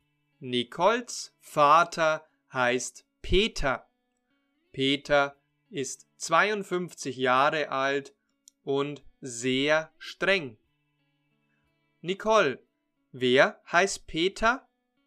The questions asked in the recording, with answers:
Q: Nicole, wer heißt Peter?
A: Mein Vater. Mein Vater heißt Peter.